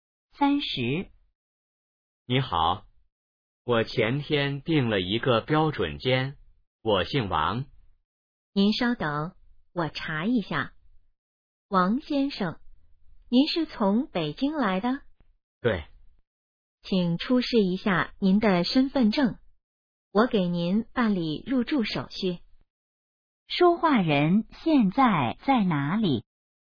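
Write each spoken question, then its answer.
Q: 说话人现在在哪里?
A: 宾馆(酒店)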